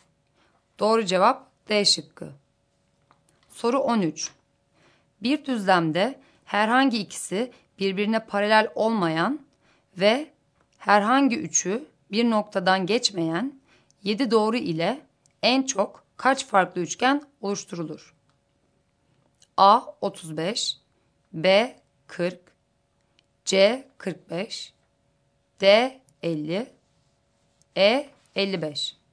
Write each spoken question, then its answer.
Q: Bir düzlemde herhangi ikisi birbirine paralel olmayan ve herhangi üçü bir noktadan geçmeyen 7 doğru ile en çok kaç farklı üçgen oluşturulur?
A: Doğru cevap A şıkkı.